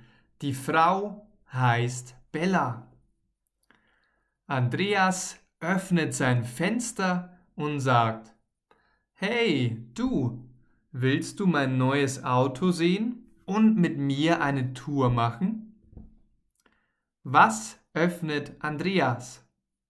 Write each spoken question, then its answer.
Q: Was öffnet Andreas?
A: Sein Fenster. Er öffnet sein Fenster.